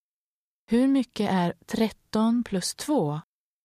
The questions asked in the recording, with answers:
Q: Hur mycket är 13 plus 2?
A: 15.